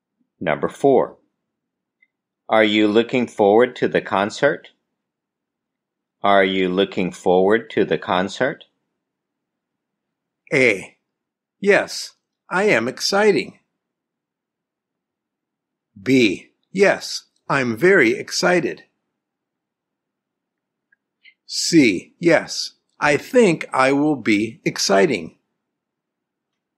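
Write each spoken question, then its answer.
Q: Are you looking forward to the concert?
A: B: Yes, I'm very excited.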